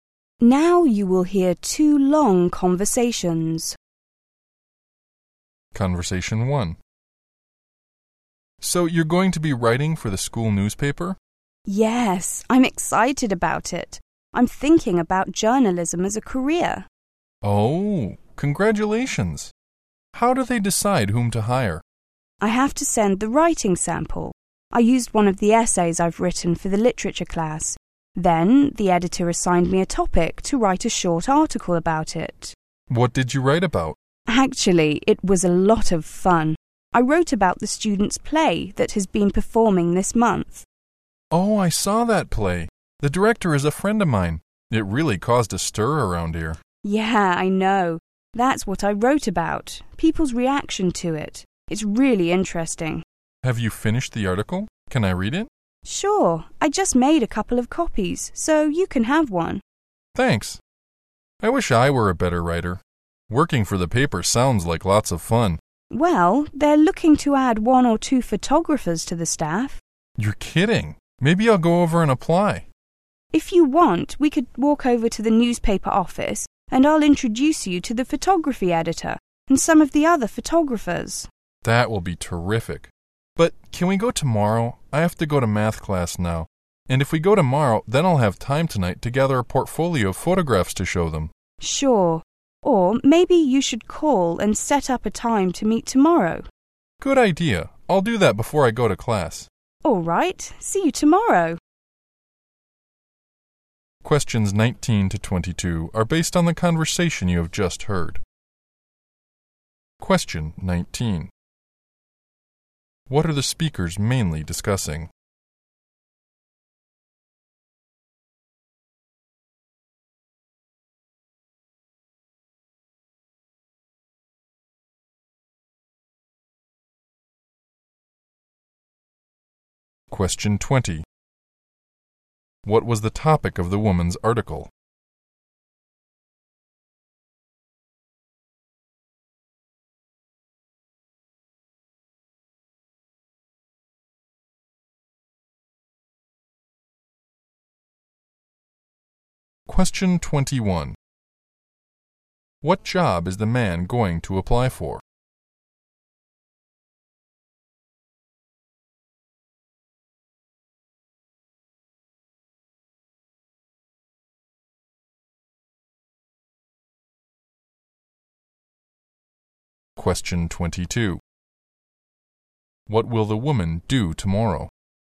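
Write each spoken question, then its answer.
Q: What are the speakers mainly discussing?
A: The woman's new job writing for the school newspaper

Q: What was the topic of the woman's article?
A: People's reaction to the student play

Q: What job is the man going to apply for?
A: Photographer for the school newspaper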